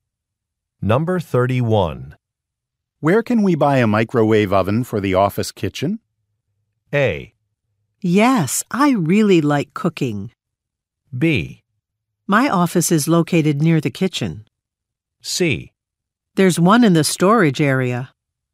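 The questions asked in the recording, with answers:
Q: Where can we buy a microwave oven for the office kitchen?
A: C: There's one in the storage area.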